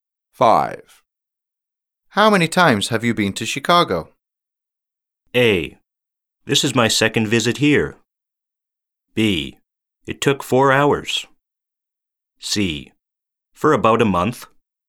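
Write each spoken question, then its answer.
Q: How many times have you been to Chicago?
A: A: This is my second visit here.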